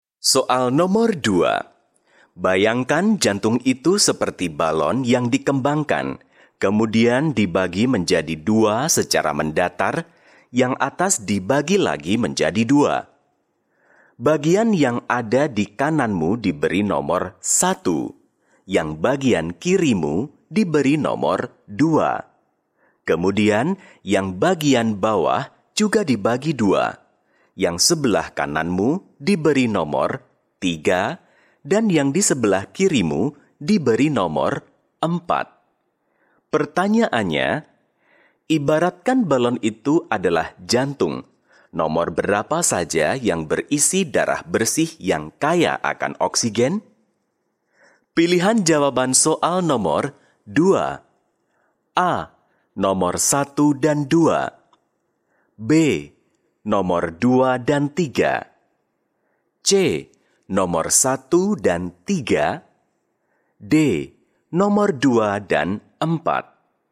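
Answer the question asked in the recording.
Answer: C: Nomor 1 dan 3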